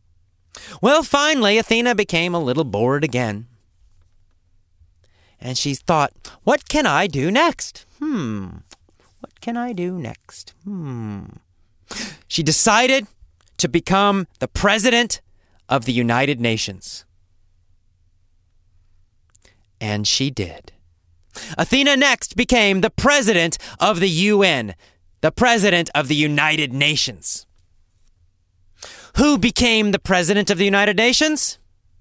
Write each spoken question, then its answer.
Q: Who became the president of the United Nations?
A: Athena. Athena the dog. The most famous dog in the world.